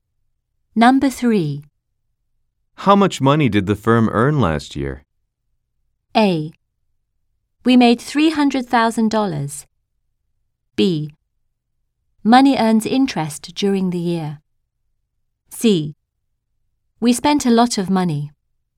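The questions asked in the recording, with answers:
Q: How much money did the firm earn last year?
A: A: We made $300,000.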